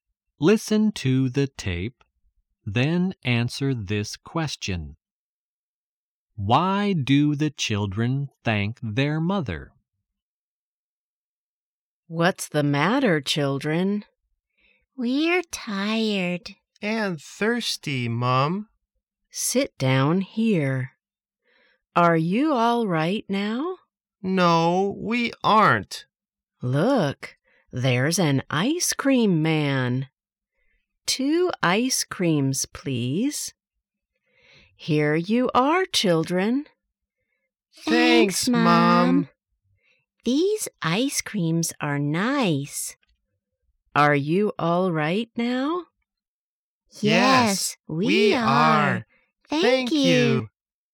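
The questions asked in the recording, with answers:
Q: Why do the children thank their mother?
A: Because she buys them ice creams.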